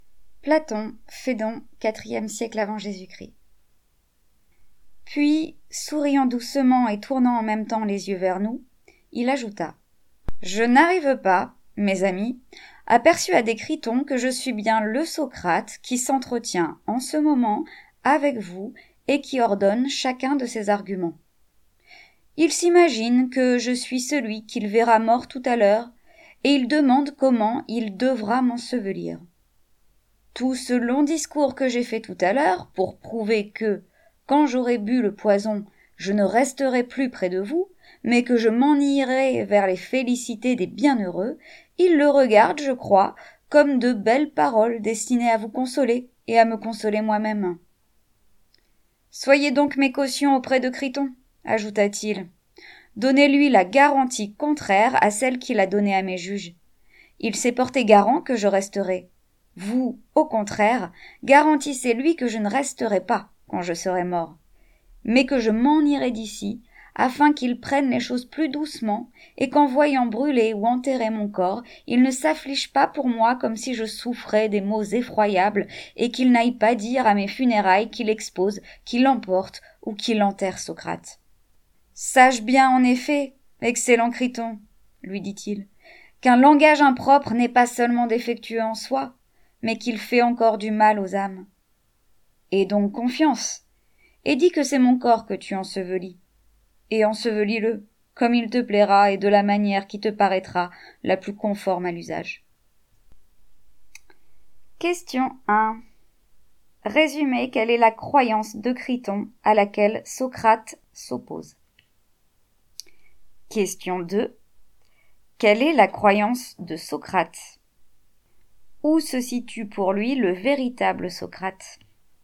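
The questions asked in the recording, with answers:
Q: Résumez quelle est la croyance de Criton à laquelle Socrate s'oppose.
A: Criton croit que Socrate, c'est le corps qu'il verra mort et qu'il devra ensevelir

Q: Quelle est la croyance de Socrate ? Où se situe pour lui le véritable Socrate ?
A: Après avoir bu le poison, son âme s'en ira vers les félicités des bienheureux ; le vrai Socrate est celui qui parle et raisonne (l'âme), pas le corps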